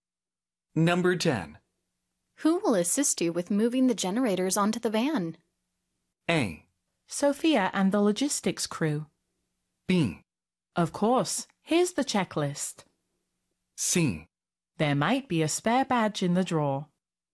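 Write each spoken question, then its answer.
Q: Who will assist you with moving the generators onto the van?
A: A: Sophia and the logistics crew.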